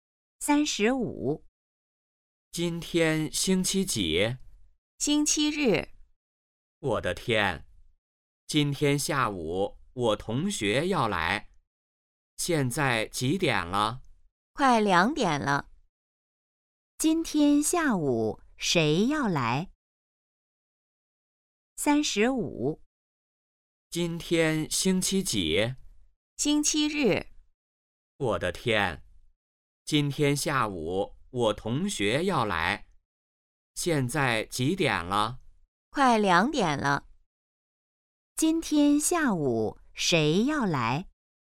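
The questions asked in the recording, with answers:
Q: 今天下午谁要来?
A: 同学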